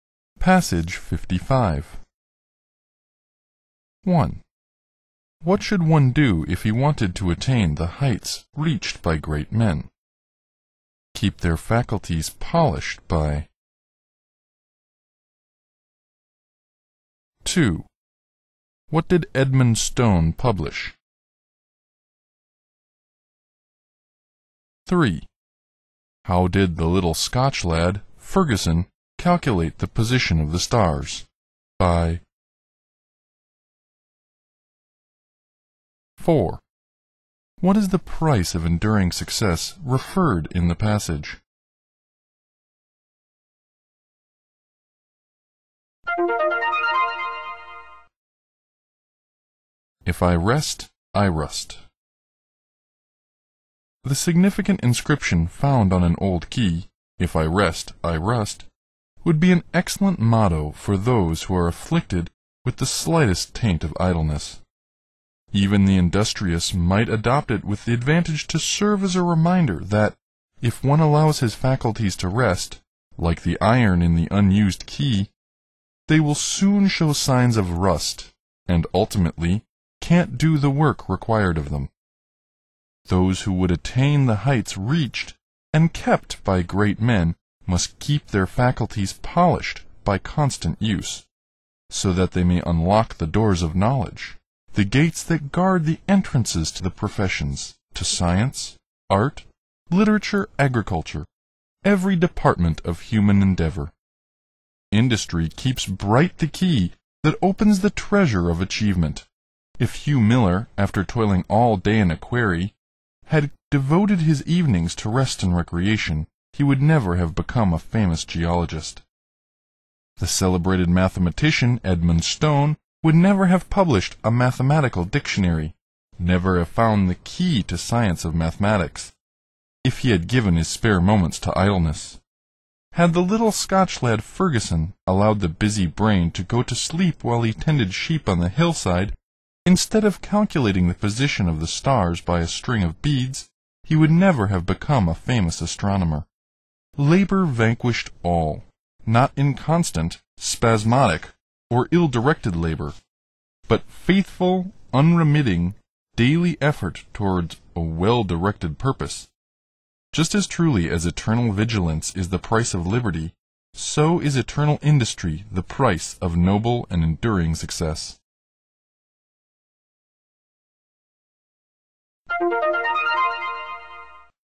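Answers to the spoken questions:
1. Keep their faculties polished by constant use
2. A mathematical dictionary
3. By a string of beads
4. Eternal industry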